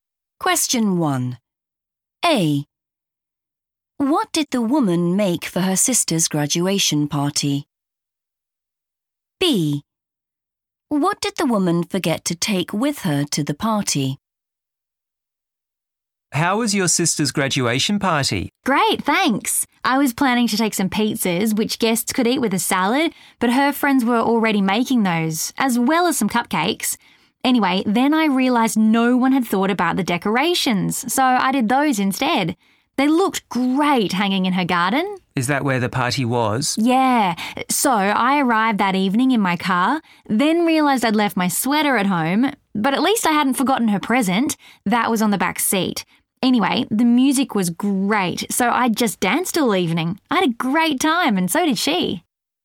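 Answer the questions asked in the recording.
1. decorations
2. her sweater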